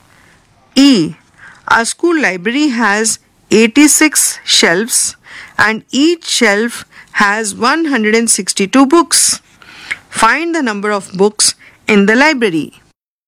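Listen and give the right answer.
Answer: 13932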